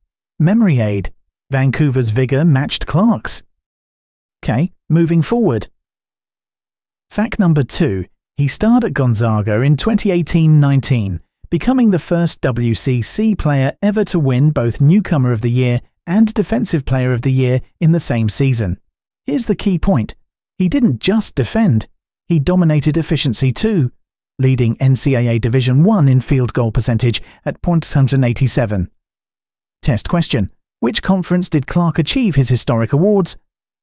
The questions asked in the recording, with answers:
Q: Which conference did Clark achieve his historic awards?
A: Correct answer. WCC.